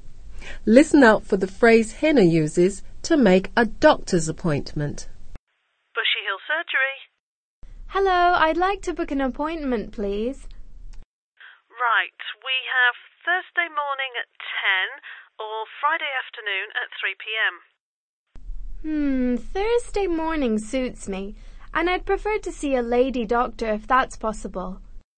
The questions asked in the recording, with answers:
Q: Listen out for the phrase Hina uses to make a doctor's appointment.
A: Hina said, I'd like to book.